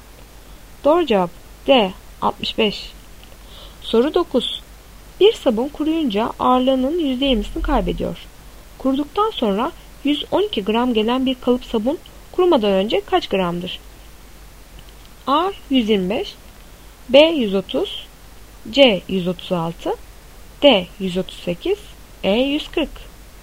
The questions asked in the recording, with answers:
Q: Kuruduktan sonra 112 gram gelen bir kalıp sabun kurumadan önce kaç gramdır?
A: Doğru cevap E 140.